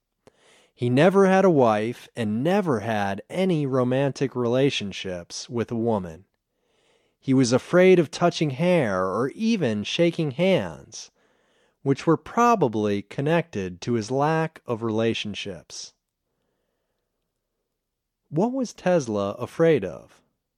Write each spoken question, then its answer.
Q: What was Tesla afraid of?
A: He was afraid of touching hair or shaking hands.